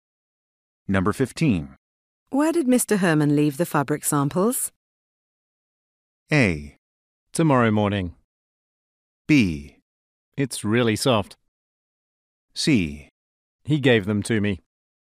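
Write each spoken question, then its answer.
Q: Where did Mr. Herman leave the fabric samples?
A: C: He gave them to me.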